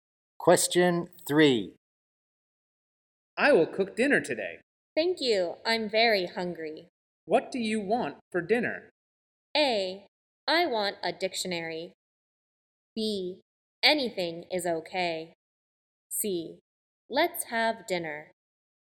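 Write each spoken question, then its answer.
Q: What do you want for dinner?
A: B: Anything is okay.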